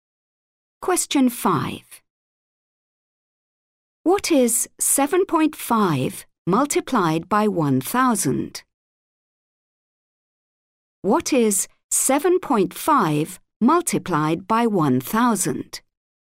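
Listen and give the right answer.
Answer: 7,500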